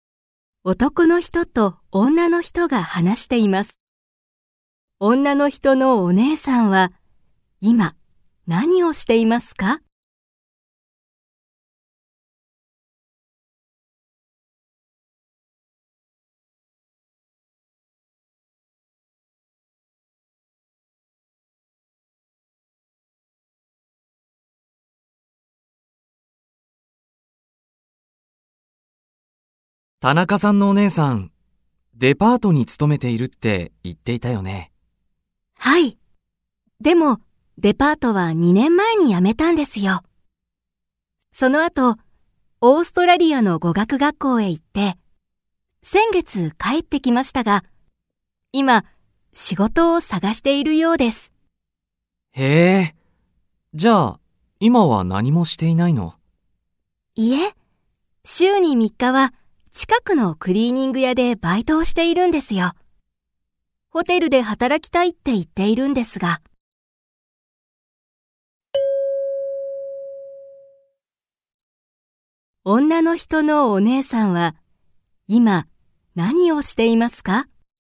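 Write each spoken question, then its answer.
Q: 女の人のお姉さんは、今何をしていますか?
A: 近くのクリーニング屋でアルバイトをしている(週に3日)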